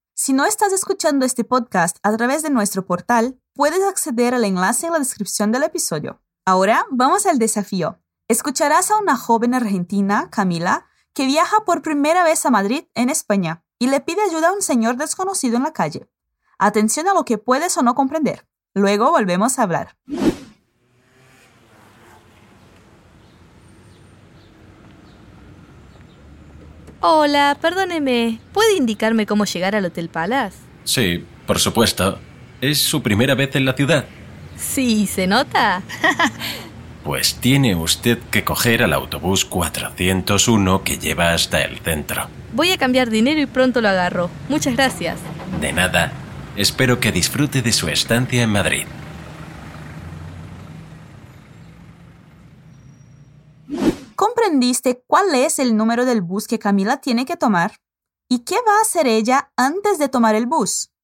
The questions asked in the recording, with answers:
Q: ¿Y qué va a hacer ella antes de tomar el bus?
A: Cambiar dinero.